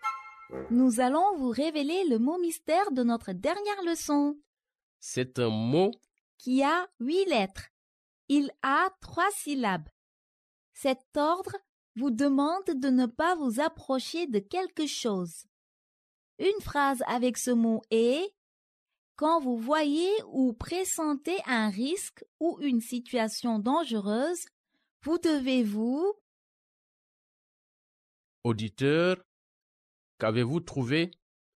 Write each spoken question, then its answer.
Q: Auditeur, qu'avez-vous trouvé?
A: Le mot mystère d'aujourd'hui est éloigné.